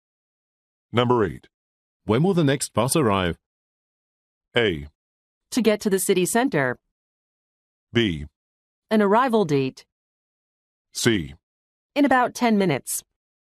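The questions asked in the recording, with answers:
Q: When will the next bus arrive?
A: C: In about 10 minutes.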